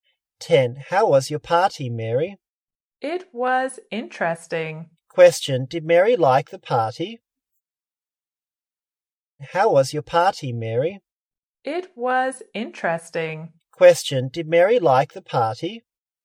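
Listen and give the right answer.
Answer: Yes, it was interesting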